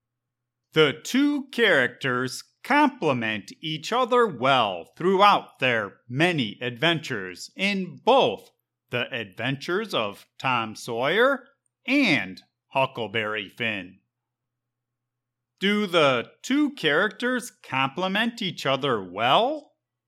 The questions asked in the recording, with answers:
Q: Do the two characters complement each other well?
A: Yes. Throughout their many adventures, the characters complement each other well.